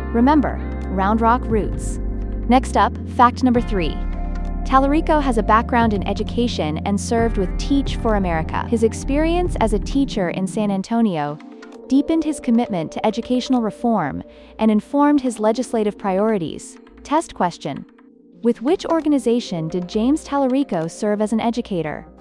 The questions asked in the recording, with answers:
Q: With which organization did James Tallarico serve as an educator?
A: Correct answer, Teach for America.